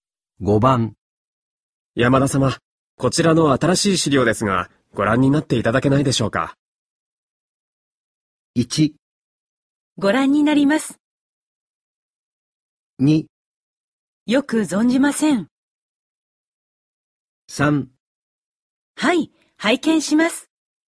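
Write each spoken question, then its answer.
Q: 山田様、こちらの新しい資料ですが、ご覧になっていただけないでしょうか。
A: 3: はい、拝見します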